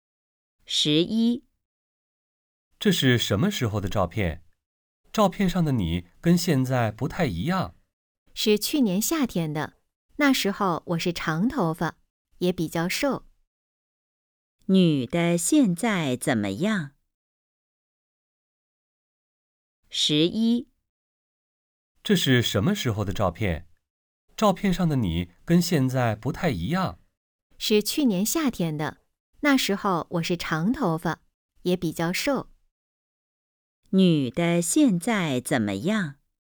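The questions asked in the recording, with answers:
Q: 女的现在怎么样?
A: 头发不长了,也比以前胖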